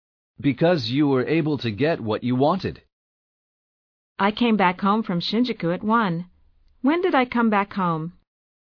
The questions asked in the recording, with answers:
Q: When did I come back home?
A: You came back home at 1.